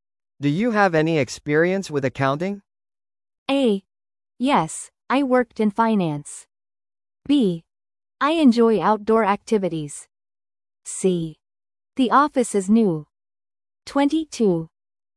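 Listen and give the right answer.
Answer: A: Yes, I worked in finance.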